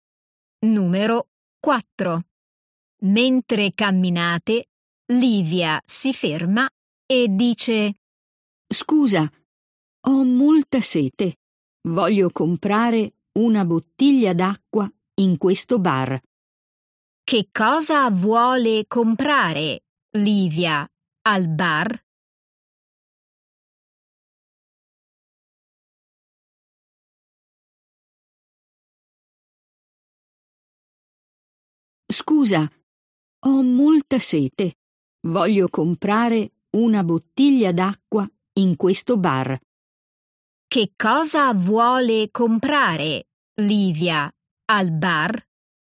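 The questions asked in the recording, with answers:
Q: Che cosa vuole comprare Livia al bar?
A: Una bottiglia d'acqua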